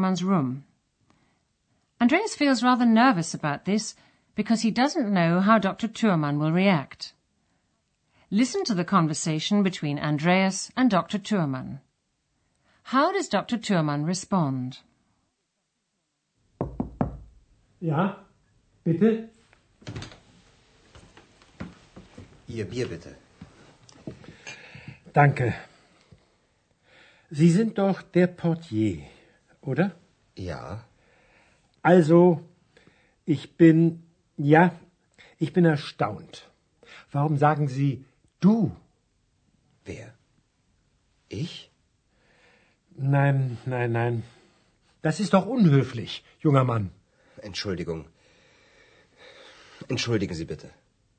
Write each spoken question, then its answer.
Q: How does Dr. Thurmann respond?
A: He's surprised that Andreas has called him du, and he asks him why he's done so.